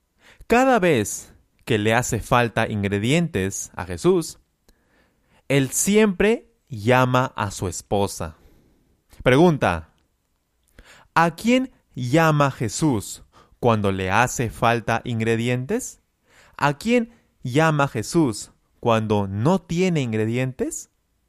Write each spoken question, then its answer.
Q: Pregunta, ¿a quién llama Jesús cuando le hace falta ingredientes?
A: él llama a su esposa.